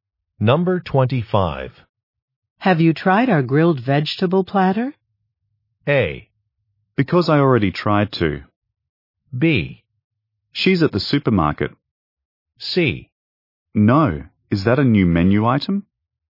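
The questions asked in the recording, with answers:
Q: Have you tried our grilled vegetable platter?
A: C: No, is that a new menu item?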